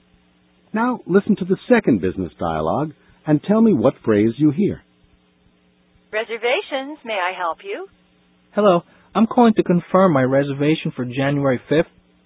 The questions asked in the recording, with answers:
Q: Now listen to the second business dialogue and tell me what phrase you hear.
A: Mr. Alioto said, I'm calling to confirm.